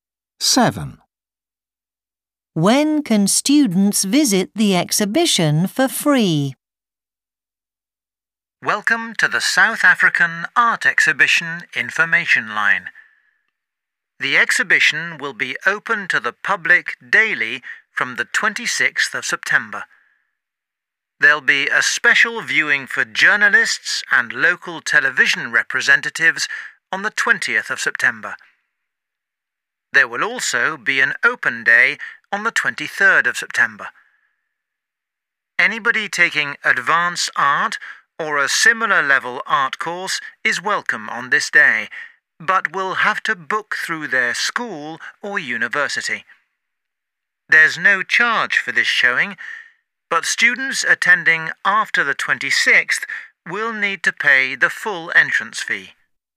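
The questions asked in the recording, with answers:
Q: When can students visit the exhibition for free?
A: On the 23rd of September (the open day)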